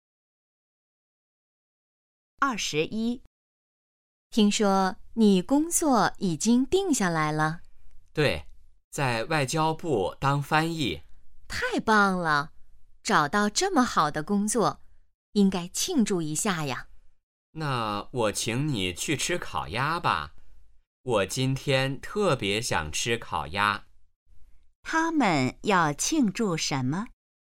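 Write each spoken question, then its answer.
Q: 他们要庆祝什么?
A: 找到了好工作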